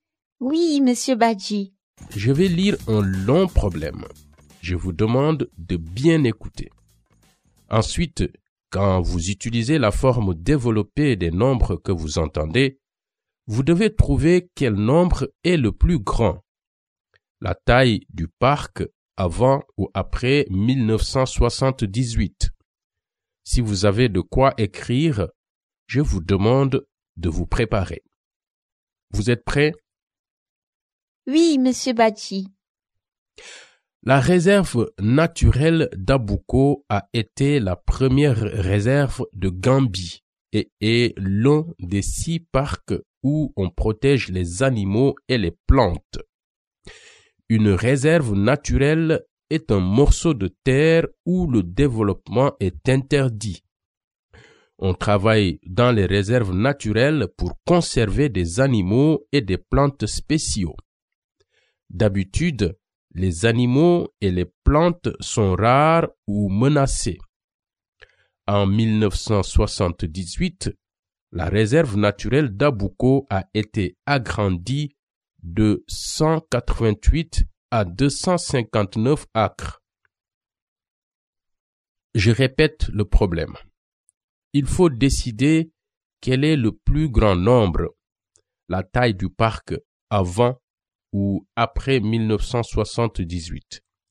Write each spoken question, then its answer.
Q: Il faut décider quel est le plus grand nombre, la taille du parc avant ou après 1978.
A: La réponse est 259.